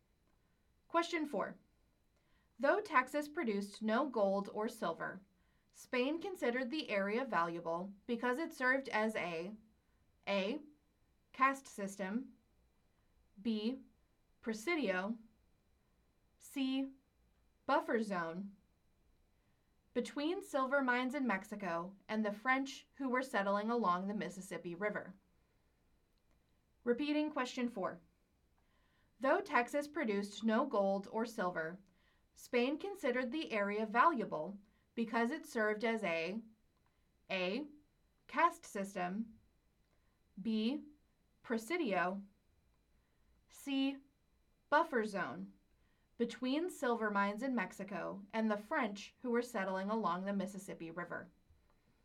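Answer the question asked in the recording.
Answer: C: buffer zone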